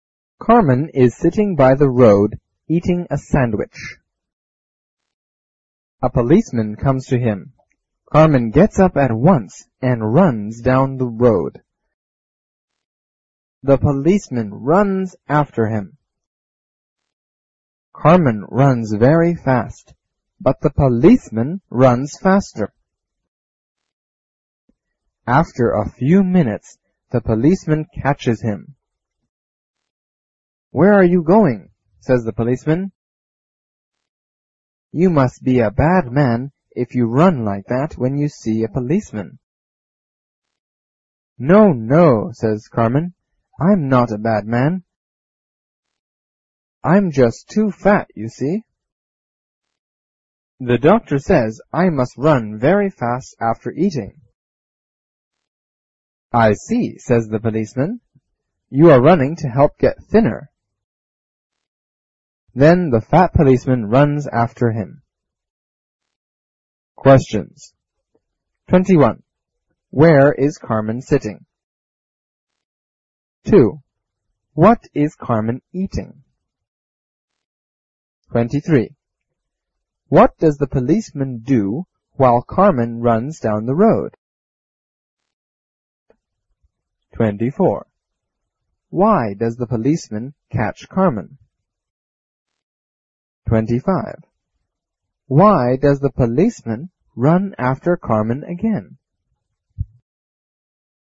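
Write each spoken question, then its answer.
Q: Where is Carmen sitting?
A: By the road

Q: What is Carmen eating?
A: A sandwich

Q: What does the policeman do while Carmen runs down the road?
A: He runs after him

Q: Why does the policeman run after Carmen again?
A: He is fat and wants to get thinner too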